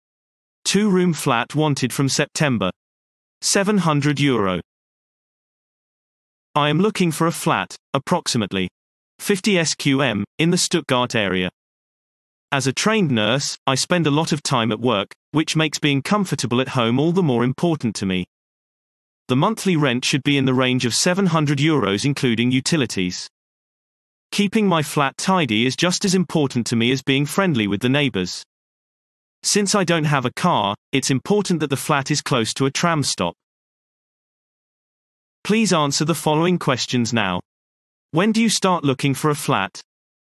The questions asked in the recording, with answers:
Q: When do you start looking for a flat?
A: Response. The flat is wanted from September.